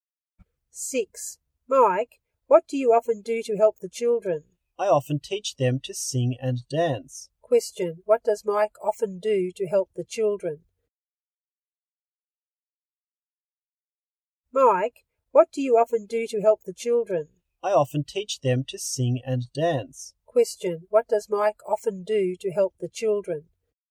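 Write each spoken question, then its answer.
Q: Question, what does Mike often do to help the children?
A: He teaches them to sing and dance.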